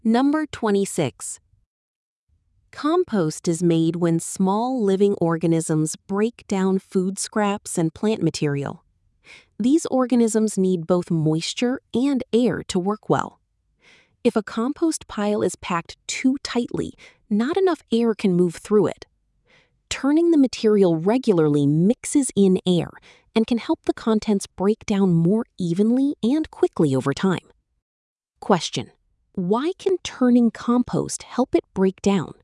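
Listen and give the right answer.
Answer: It mixes in air, which the organisms need, so the contents break down more evenly and quickly.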